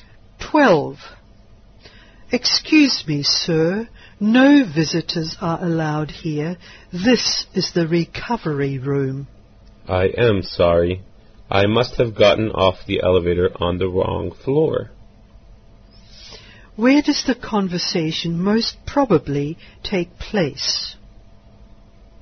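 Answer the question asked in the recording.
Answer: In a hospital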